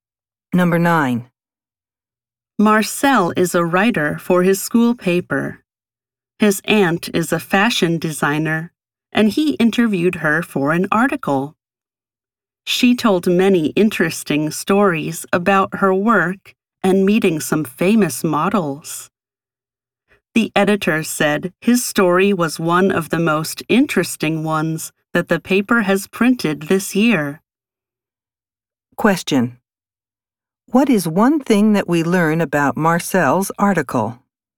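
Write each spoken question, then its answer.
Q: What is one thing that we learn about Marcel's article?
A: The editor said it was one of the most interesting stories the paper has printed this year.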